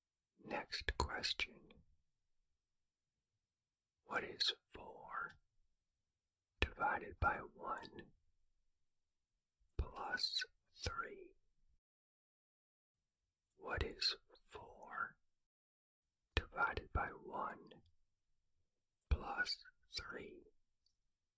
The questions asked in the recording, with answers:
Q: What is 4 divided by 1 plus 3?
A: The answer is 7.